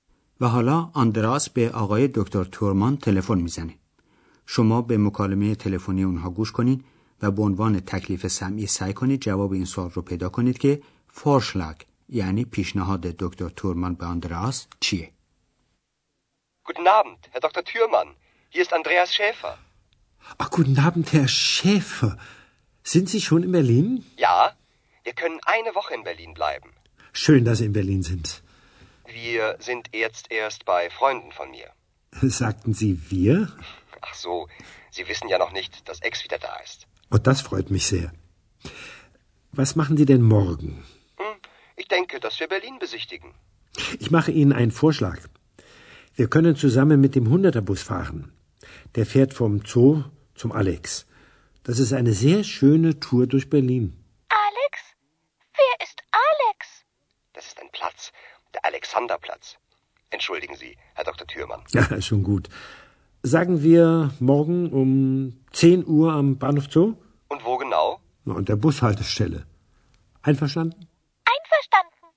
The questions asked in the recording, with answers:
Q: فورشلاگ یعنی پیشنهاد دکتر تورمان به آندراس چیه؟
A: پس پیشنهاد دکتر تورمان این بود که برای دیدن نقاط و دیدنی های مختلف شهر سوار اتوبوس خط 100 بشن.